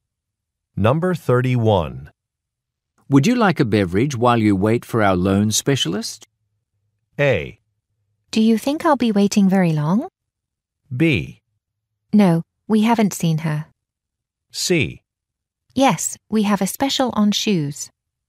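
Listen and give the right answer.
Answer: A: Do you think I'll be waiting very long?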